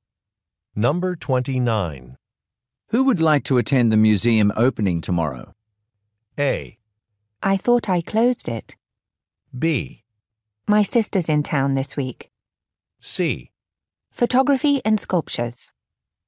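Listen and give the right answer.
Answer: B: My sister's in town this week.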